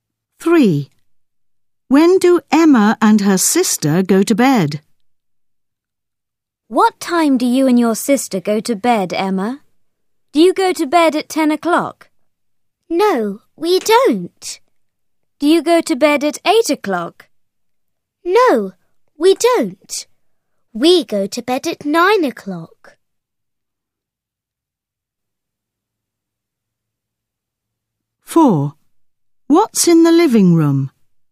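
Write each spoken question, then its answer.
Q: When do Emma and her sister go to bed?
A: At 9 o'clock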